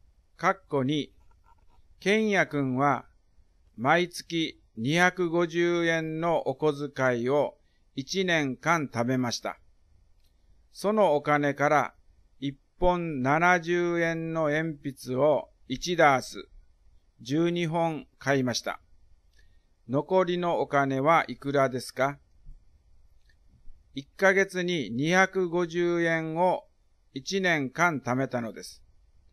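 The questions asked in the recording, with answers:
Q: 残りのお金はいくらですか?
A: 2160円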